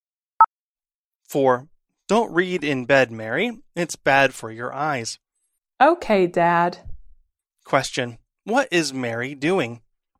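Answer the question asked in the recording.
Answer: Reading in bed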